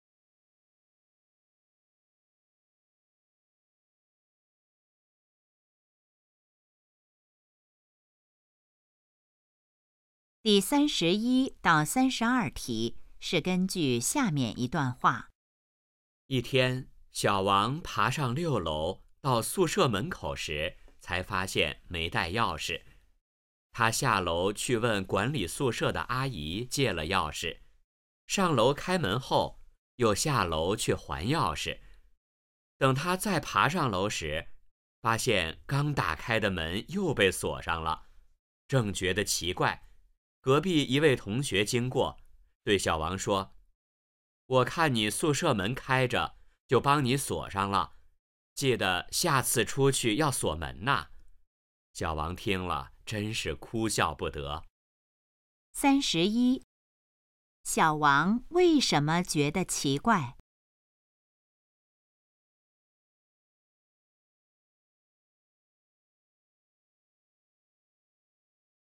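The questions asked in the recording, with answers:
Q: 小王为什么觉得奇怪?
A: 刚打开的门又被锁上了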